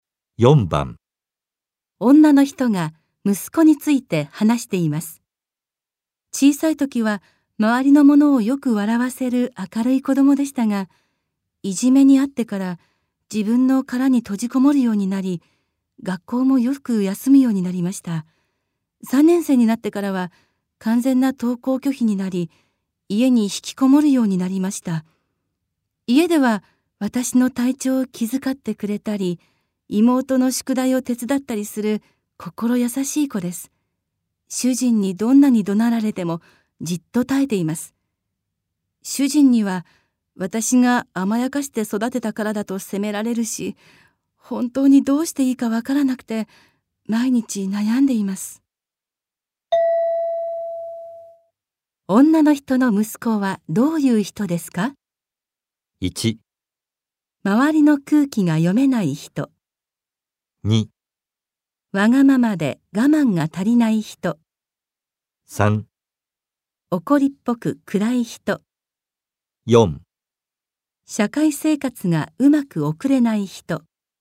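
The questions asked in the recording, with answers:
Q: 女の人の息子はどういう人ですか?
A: 4: 社会生活がうまく送れない人。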